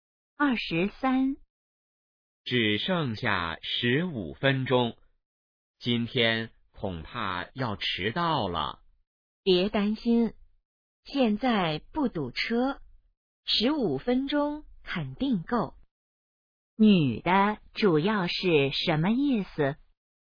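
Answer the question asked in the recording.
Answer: 不会迟到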